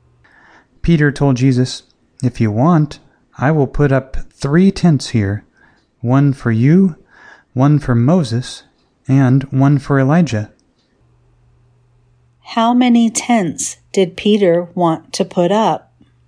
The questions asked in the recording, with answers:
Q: How many tents did Peter want to put up?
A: Peter wanted to put up 3 tents.